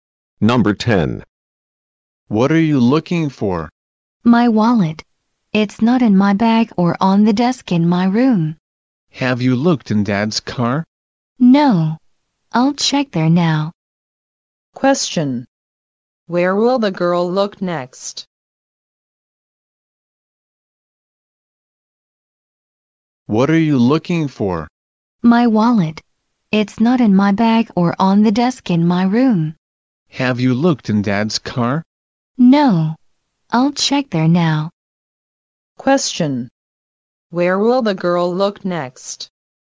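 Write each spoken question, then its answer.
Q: Where will the girl look next?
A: In Dad's car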